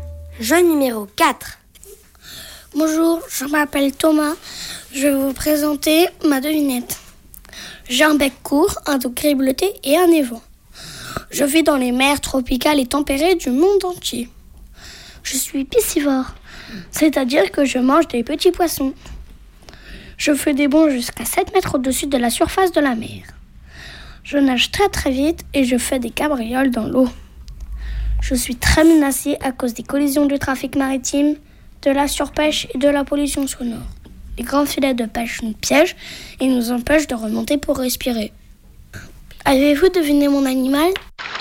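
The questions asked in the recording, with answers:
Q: Avez-vous deviné mon animal ?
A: le dauphin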